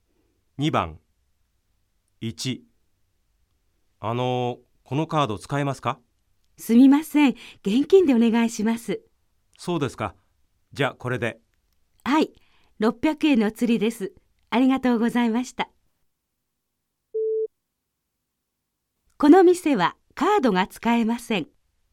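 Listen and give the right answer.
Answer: ○(正しい)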